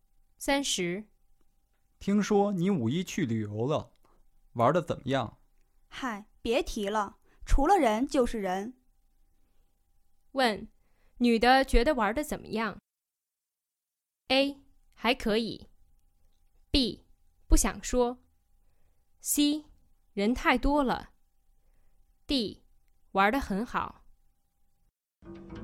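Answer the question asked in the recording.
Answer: C: 人太多了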